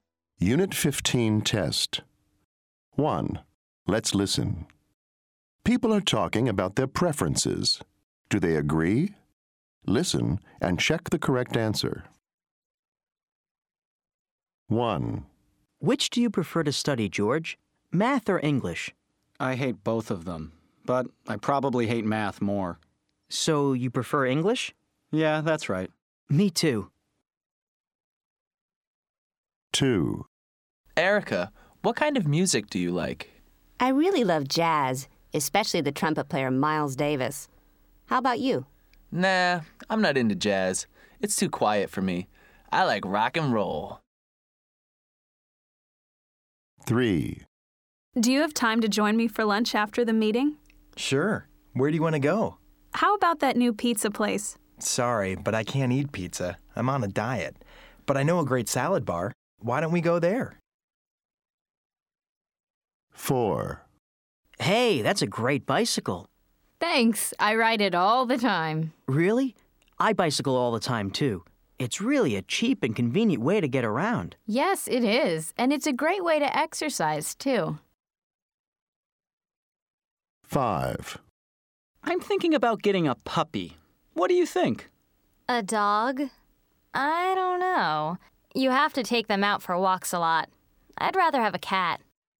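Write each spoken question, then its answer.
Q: Do they agree?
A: Yes, they agree (both prefer English)

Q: Do they agree?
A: No, they disagree (jazz vs. rock and roll)

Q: Do they agree?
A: No, they disagree (pizza vs. salad bar)

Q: Do they agree?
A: Yes, they agree (both like bicycling)

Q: Do they agree?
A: No, they disagree (puppy vs. cat)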